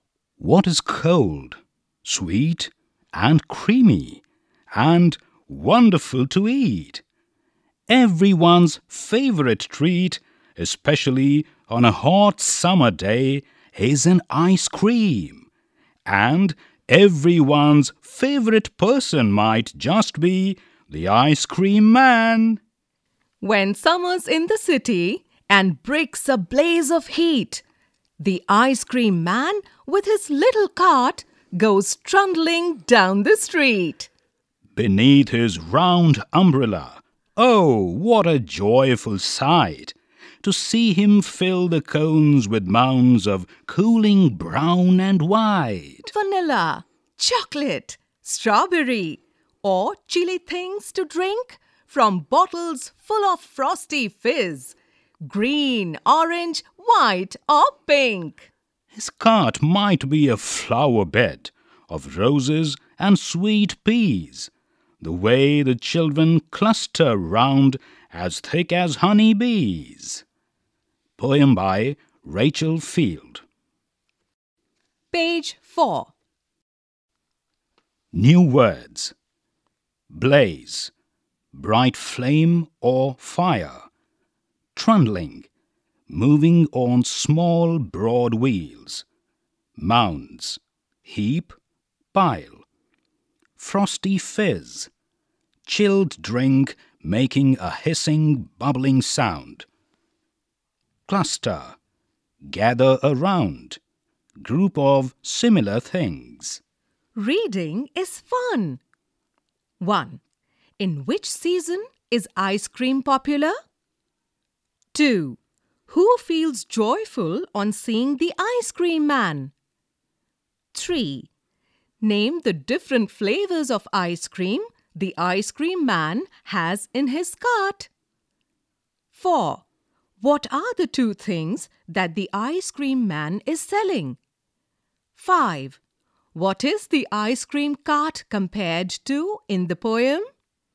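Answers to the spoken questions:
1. Summer
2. The children
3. Vanilla, chocolate and strawberry
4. Ice cream and cold fizzy drinks
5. A flower bed of roses and sweet peas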